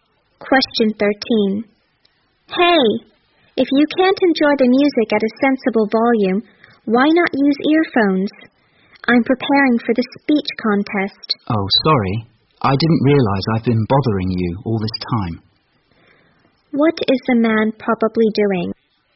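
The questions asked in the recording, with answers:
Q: What is the man probably doing?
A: Playing music loudly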